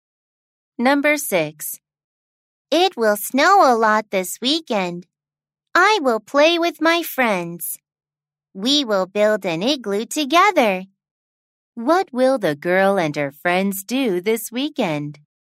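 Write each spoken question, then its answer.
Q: What will the girl and her friends do this weekend?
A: They will build an igloo together.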